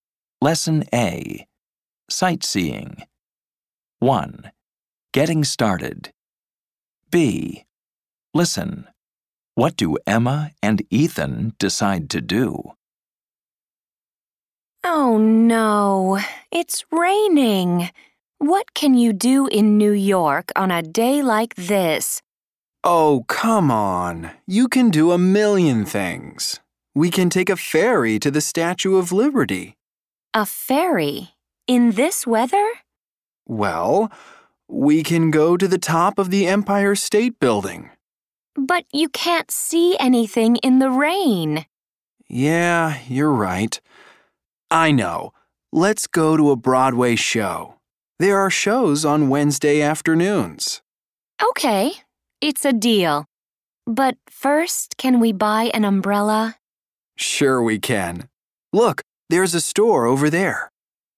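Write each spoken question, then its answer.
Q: What do Emma and Ethan decide to do?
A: Go to a Broadway show (after buying an umbrella)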